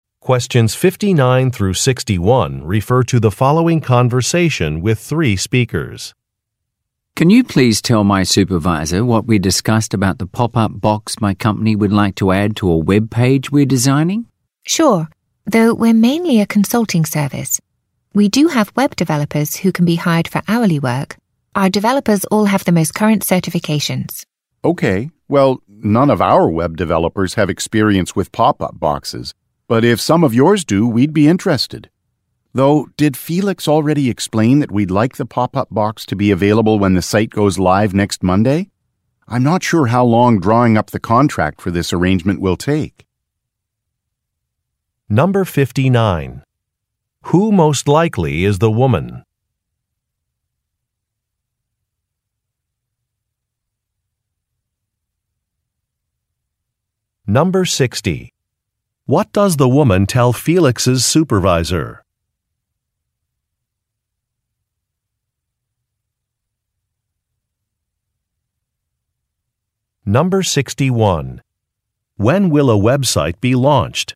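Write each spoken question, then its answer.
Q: When will a website be launched?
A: Next Monday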